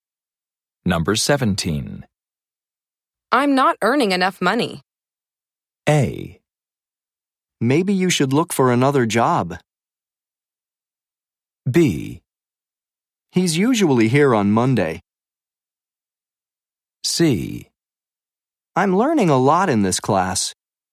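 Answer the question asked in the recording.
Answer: A: Maybe you should look for another job.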